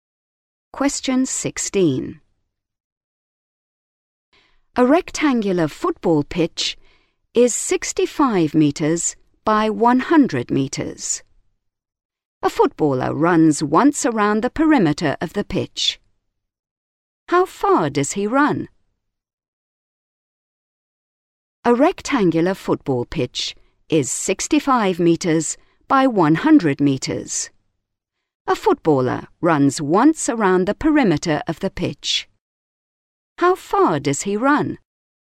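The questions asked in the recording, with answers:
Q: How far does he run?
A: 330 metres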